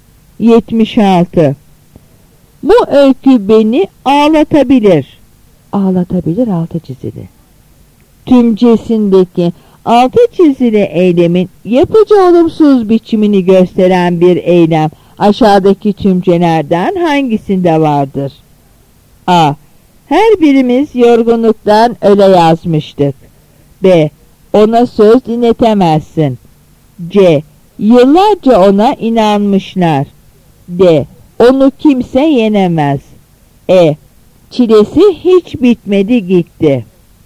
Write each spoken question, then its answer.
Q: Tümcesindeki altı çizili eylemin yapıcı olumsuz biçimini gösteren bir eylem aşağıdaki tümcelerden hangisinde vardır?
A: Yanıt B.